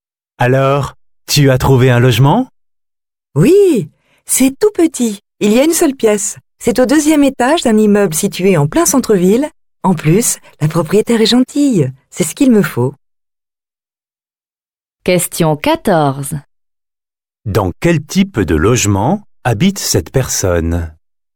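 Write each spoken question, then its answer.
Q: Dans quel type de logement habite cette personne?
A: Un studio : un petit appartement d'une seule pièce, au deuxième étage d'un immeuble en centre-ville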